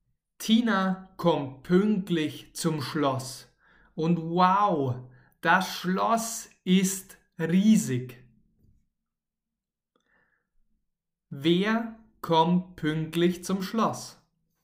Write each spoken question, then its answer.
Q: Wer kommt pünktlich zum Schloss?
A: Tina. Tina kommt pünktlich zum Schloss.